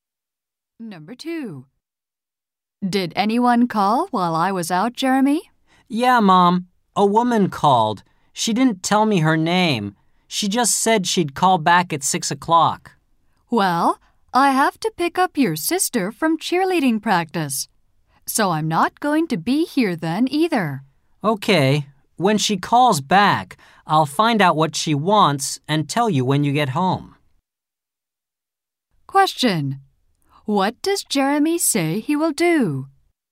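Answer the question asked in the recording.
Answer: Find out what the woman wants when she calls back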